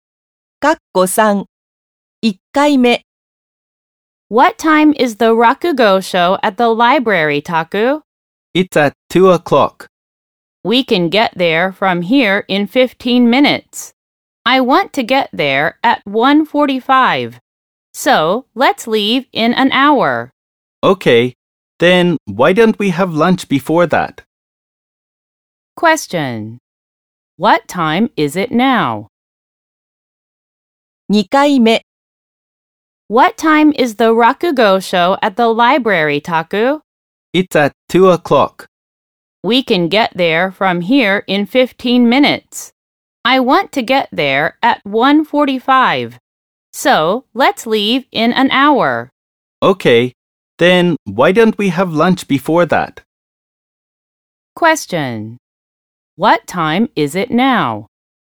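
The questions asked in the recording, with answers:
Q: What time is it now?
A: 12:30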